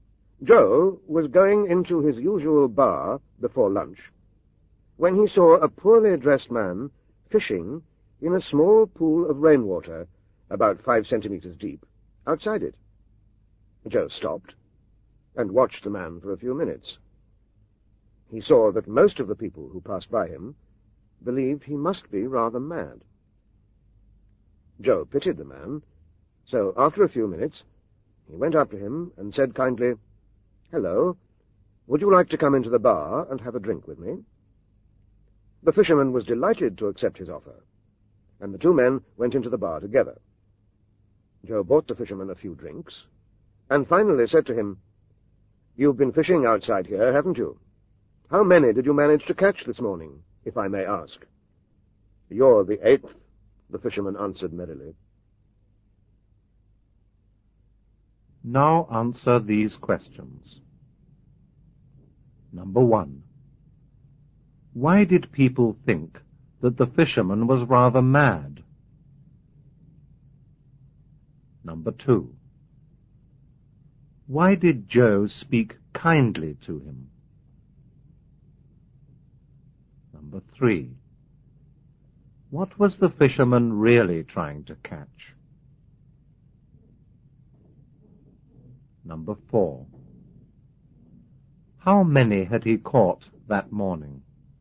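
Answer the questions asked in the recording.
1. Because he was fishing in a small pool of rainwater only about 5 centimeters deep.
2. Because he pitied him.
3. People who would buy him drinks.
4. Eight, counting Joe.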